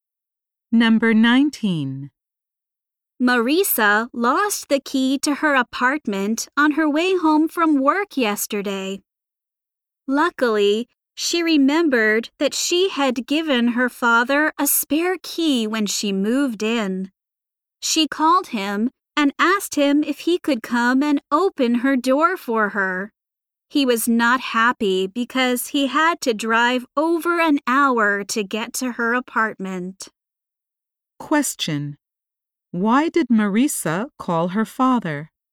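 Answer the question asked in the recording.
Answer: She lost her key and he had a spare key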